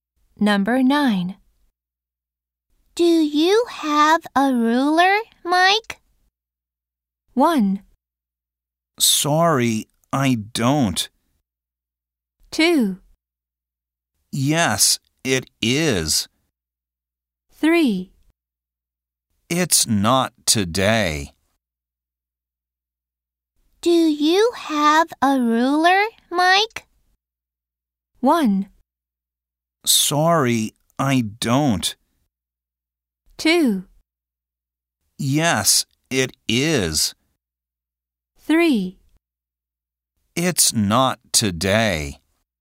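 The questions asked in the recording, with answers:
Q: Do you have a ruler, Mike?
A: 1: Sorry, I don't.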